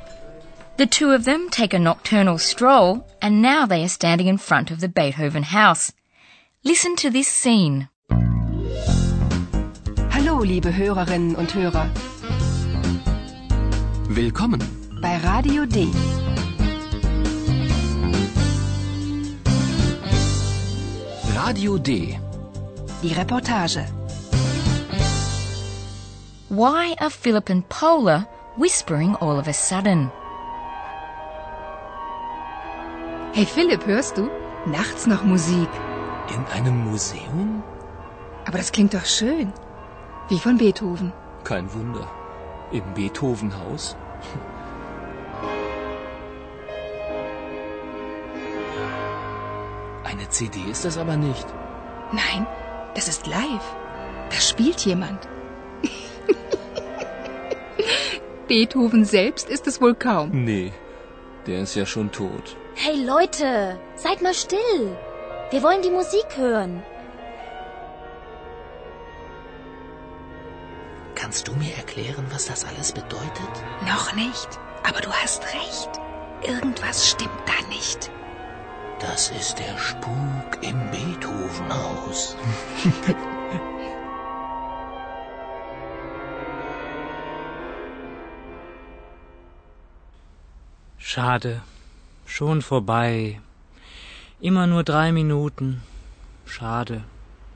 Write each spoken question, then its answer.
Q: Why are Philip and Paula whispering all of a sudden?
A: And after this request, Philip and Paula start whispering.